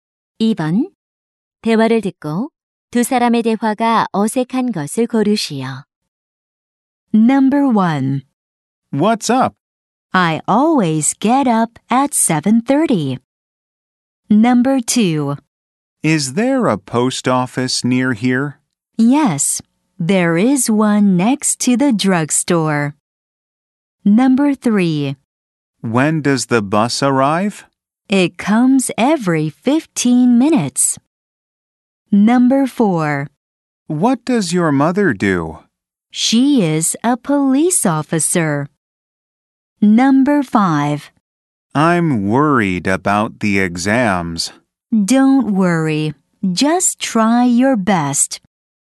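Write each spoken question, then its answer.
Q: 대화를 듣고 두 사람의 대화가 어색한 것을 고르시오.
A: 1: What's up? / I always get up at 7:30.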